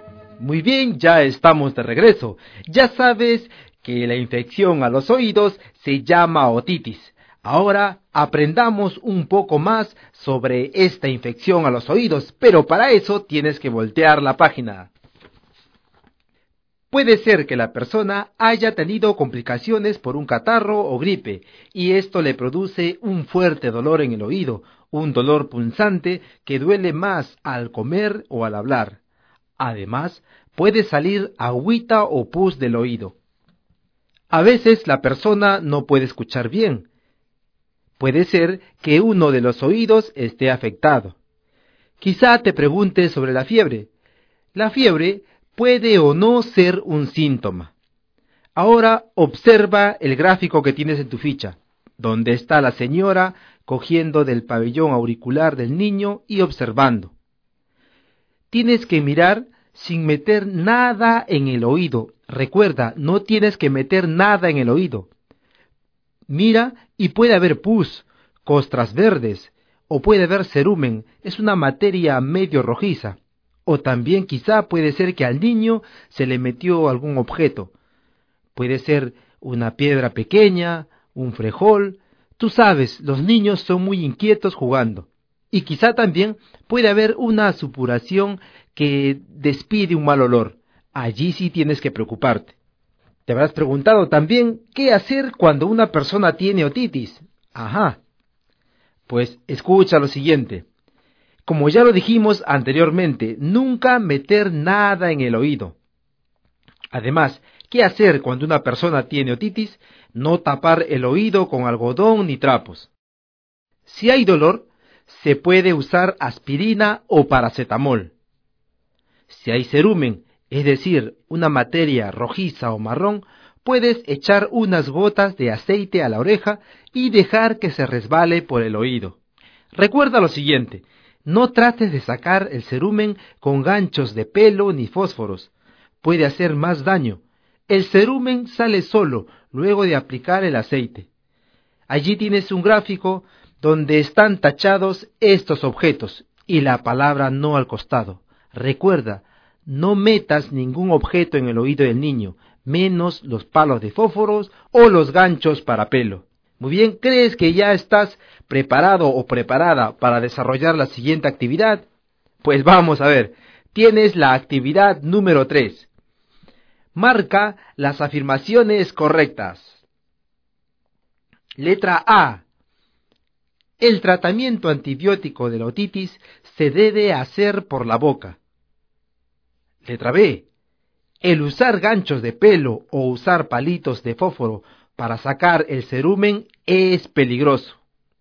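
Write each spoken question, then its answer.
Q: El usar ganchos de pelo o usar palitos de fósforo para sacar el cerumen es peligroso.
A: Correcta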